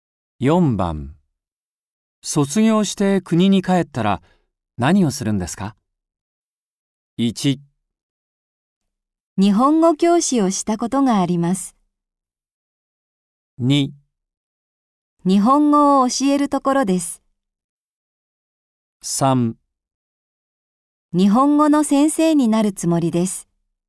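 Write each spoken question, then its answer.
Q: 卒業して国に帰ったら何をするんですか?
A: 3: 日本語の先生になるつもりです。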